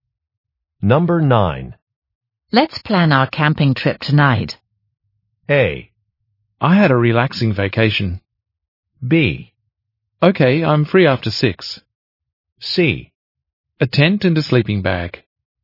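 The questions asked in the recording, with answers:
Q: Let's plan our camping trip tonight.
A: B: Okay, I'm free after 6.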